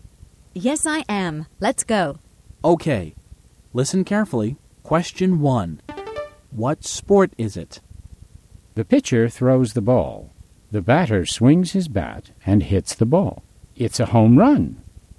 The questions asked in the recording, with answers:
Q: What sport is it?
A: It's baseball.